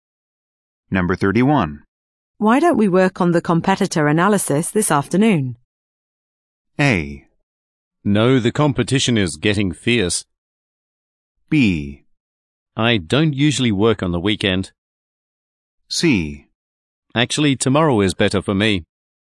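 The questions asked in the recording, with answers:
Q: Why don't we work on the competitor analysis this afternoon?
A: C: Actually, tomorrow is better for me.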